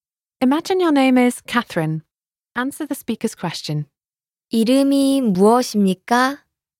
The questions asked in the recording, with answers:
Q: 이름이 무엇입니까?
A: 제 이름은 캐서린입니다.